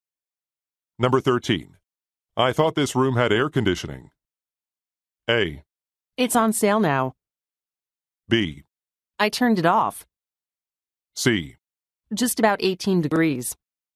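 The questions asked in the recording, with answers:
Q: I thought this room had air conditioning.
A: B: I turned it off.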